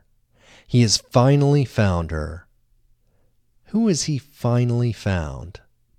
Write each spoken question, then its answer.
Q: Who has he finally found?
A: He has finally found his mother.